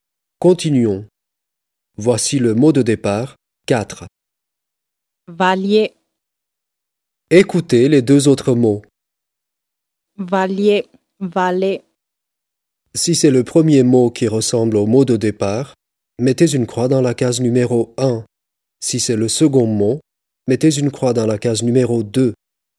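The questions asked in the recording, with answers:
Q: Si c'est le premier mot qui ressemble au mot de départ, mettez une croix dans la case numéro 1.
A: 1: valier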